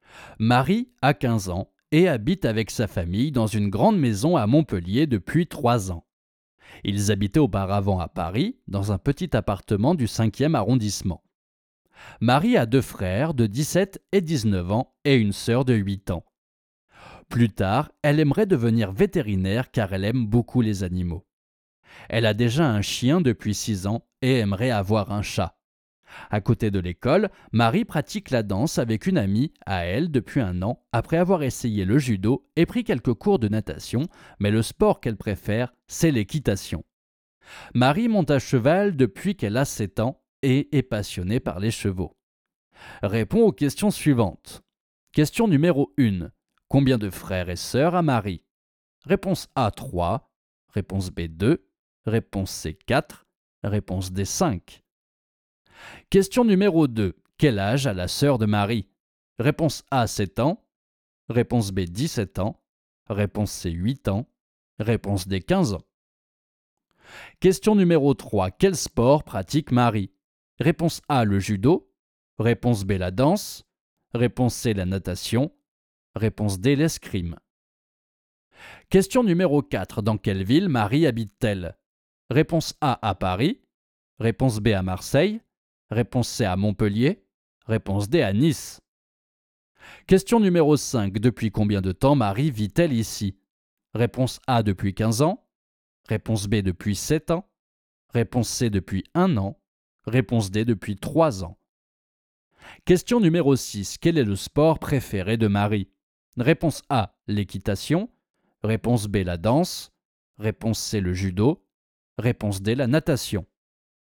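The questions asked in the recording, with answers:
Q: Combien de frères et sœurs a Marie?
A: A: 3

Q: Quel âge a la sœur de Marie?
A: C: 8 ans

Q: Quel sport pratique Marie?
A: B: la danse

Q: Dans quelle ville Marie habite-t-elle?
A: C: à Montpellier

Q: Depuis combien de temps Marie vit-elle ici?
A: D: depuis 3 ans

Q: Quel est le sport préféré de Marie?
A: A: l'équitation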